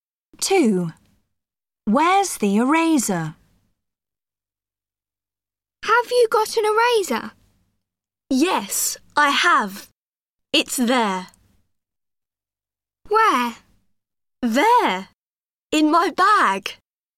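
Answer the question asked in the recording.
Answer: In the bag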